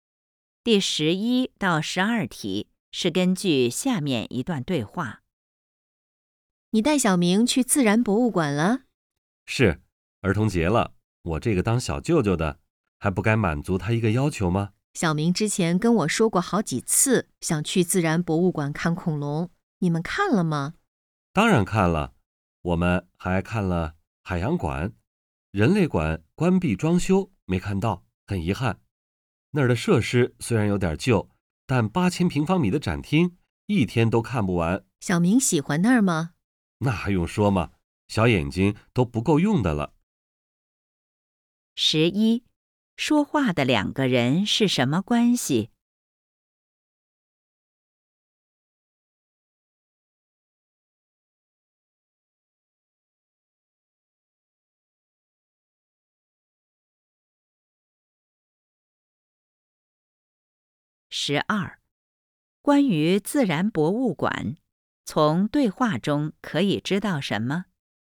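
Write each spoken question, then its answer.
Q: 关于自然博物馆,从对话中可以知道什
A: 人类馆在关闭装修;展厅8000平方米,一天看不完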